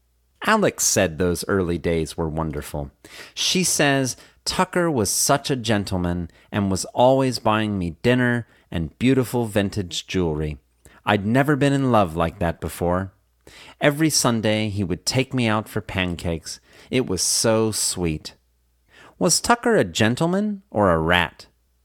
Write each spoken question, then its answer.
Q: Was Tucker a gentleman or a rat?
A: Tucker was a gentleman.